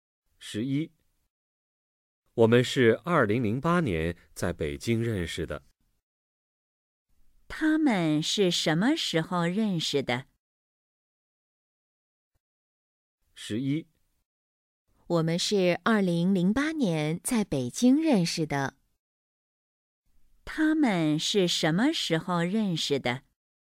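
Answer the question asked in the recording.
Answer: 2008年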